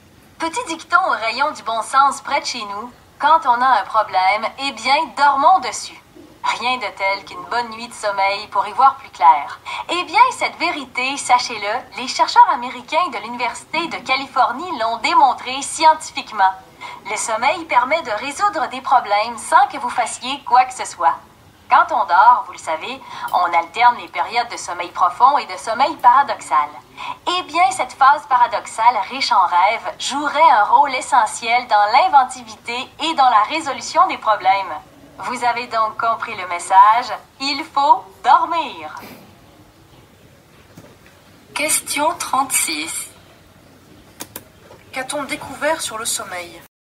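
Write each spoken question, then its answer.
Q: Qu'a-t-on découvert sur le sommeil?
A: Le sommeil, surtout la phase paradoxale, aide à résoudre les problèmes.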